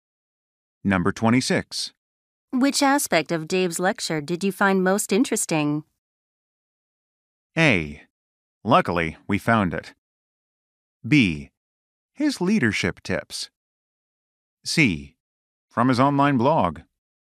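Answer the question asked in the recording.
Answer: B: His leadership tips.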